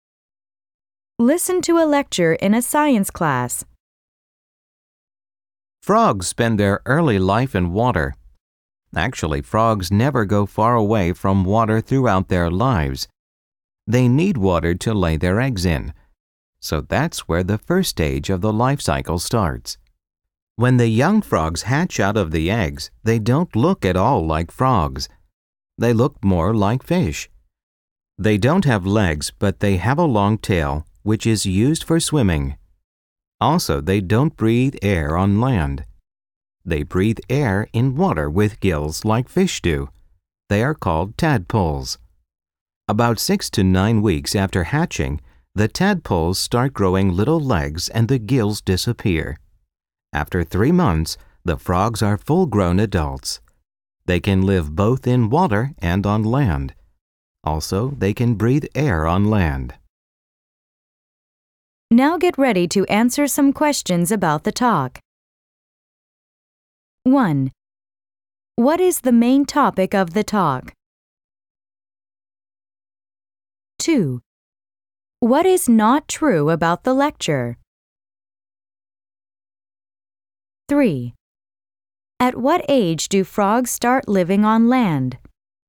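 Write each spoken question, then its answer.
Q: What is the main topic of the talk?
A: The life cycle of frogs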